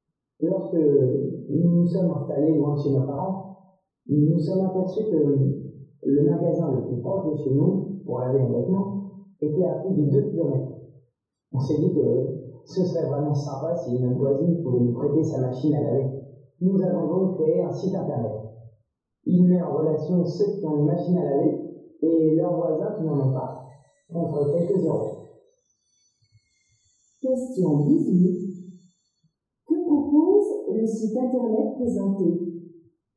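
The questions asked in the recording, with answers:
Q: Que propose le site internet présenté ?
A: Utiliser la machine à laver d'un voisin contre quelques euros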